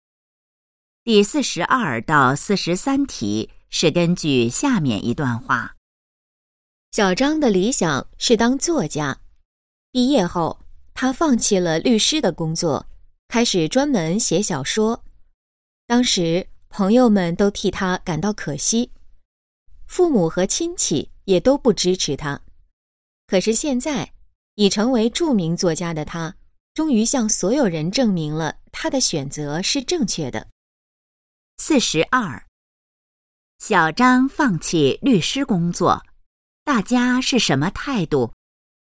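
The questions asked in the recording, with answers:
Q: 小张放弃律师工作,大家是什么态度?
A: 觉得可惜,不支持他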